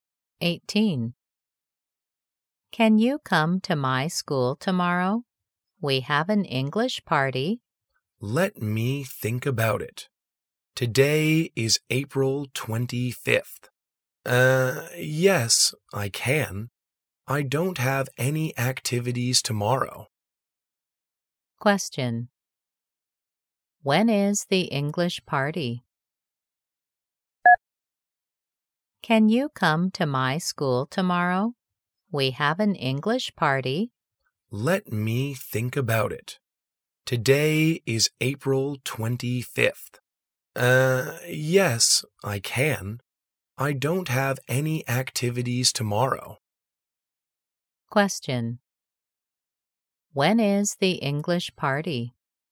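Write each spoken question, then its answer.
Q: When is the English party?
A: April 26th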